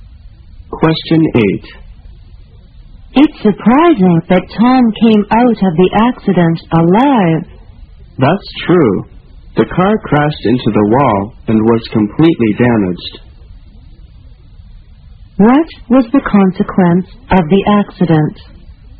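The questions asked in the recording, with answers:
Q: What was the consequence of the accident?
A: The car was completely damaged, but Tom survived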